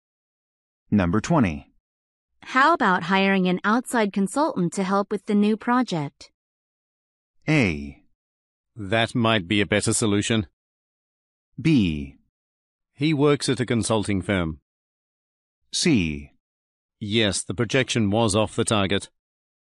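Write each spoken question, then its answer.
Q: How about hiring an outside consultant to help with the new project?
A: A: That might be a better solution.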